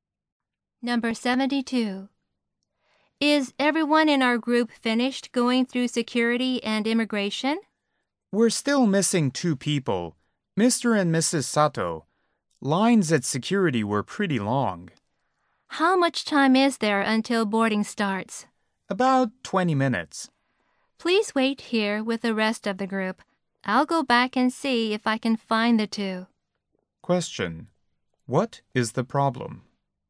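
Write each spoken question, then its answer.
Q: What is the problem?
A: Two group members, Mr. and Mrs. Sato, are still missing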